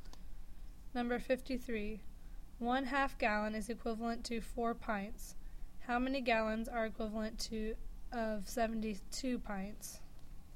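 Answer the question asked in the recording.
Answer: 9 gallons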